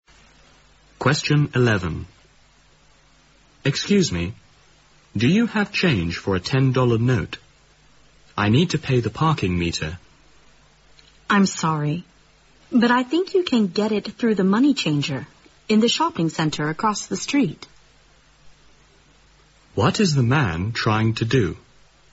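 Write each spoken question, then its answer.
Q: What is the man trying to do?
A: Get change for a $10 note to pay the parking meter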